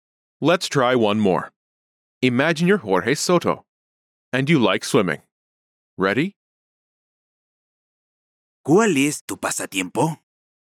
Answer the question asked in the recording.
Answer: Me gusta nadar.